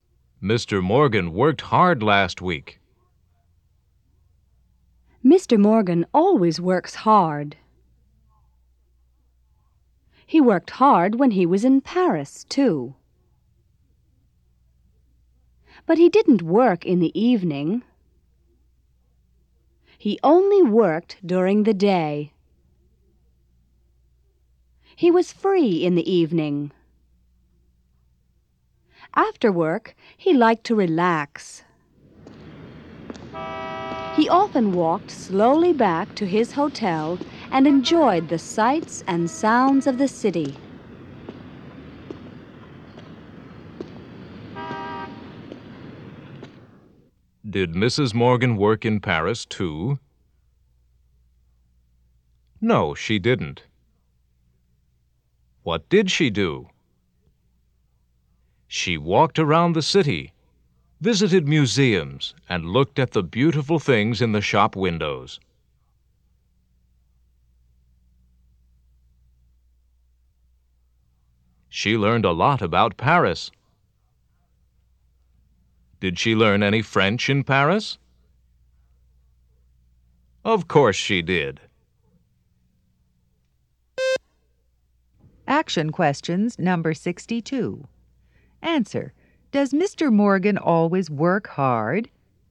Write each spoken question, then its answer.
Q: Does Mr. Morgan always work hard?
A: Yes, he does.